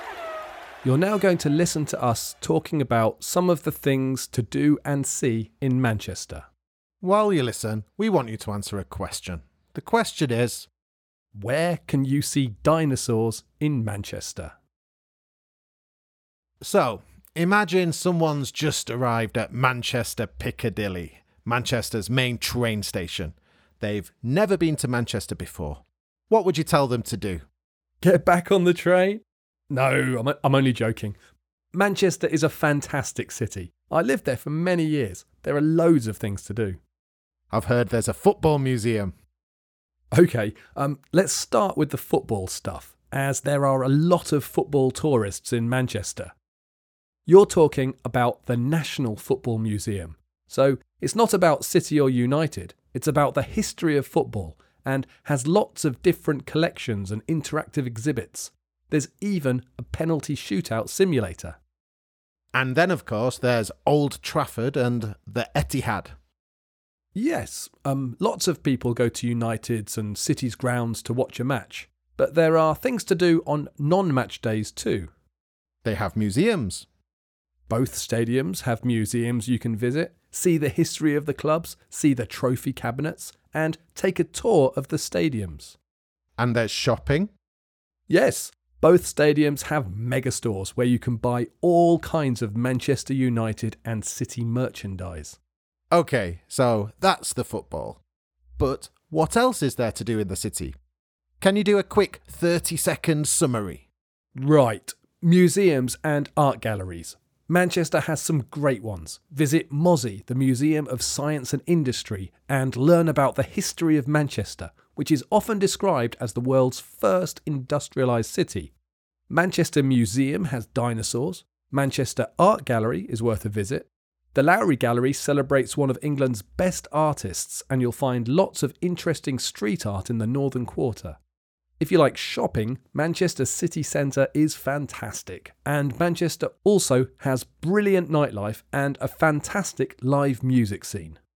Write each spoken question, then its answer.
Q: where can you see dinosaurs in Manchester?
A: The answer is the Manchester Museum.